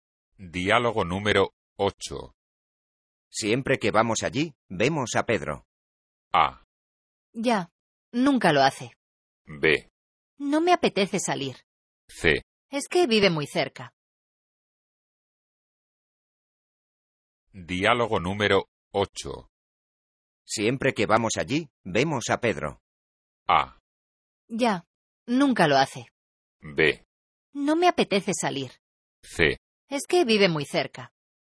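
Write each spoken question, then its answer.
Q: Siempre que vamos allí, vemos a Pedro.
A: C: Es que vive muy cerca.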